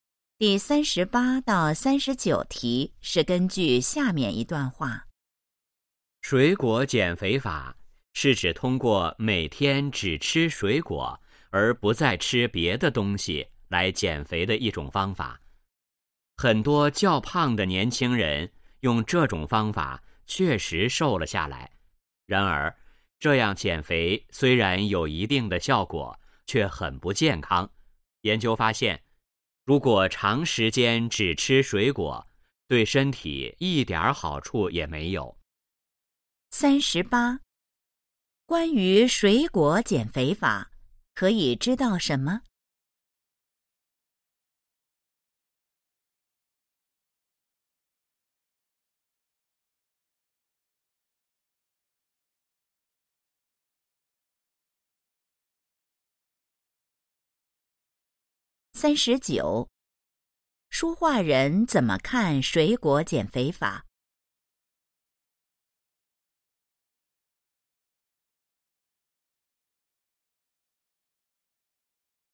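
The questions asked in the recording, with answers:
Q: 书画人怎么看水果减肥法?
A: 不健康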